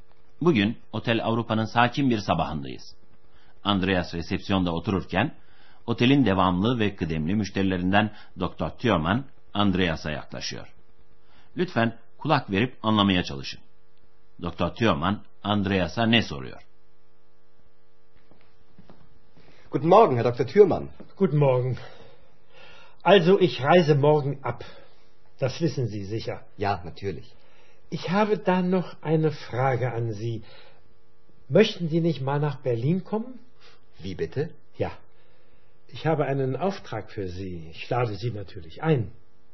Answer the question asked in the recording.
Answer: Doktor Thürmann otelden ayrılıyor ve Andreas'a Berlin'e gelmek istemez misiniz diye soruyor.